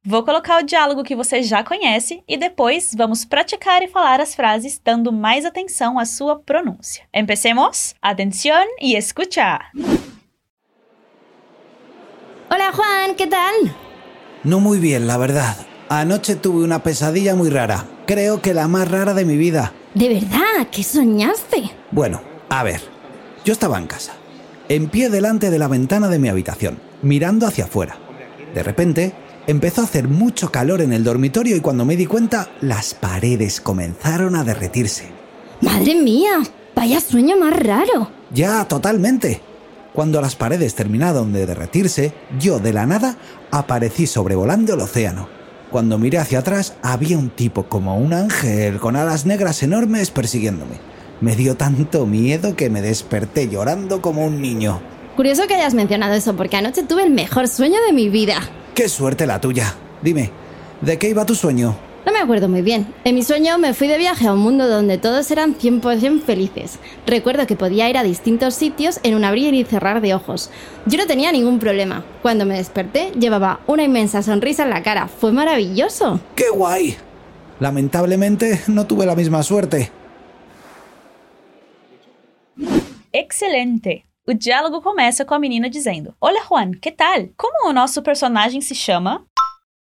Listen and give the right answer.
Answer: Juan.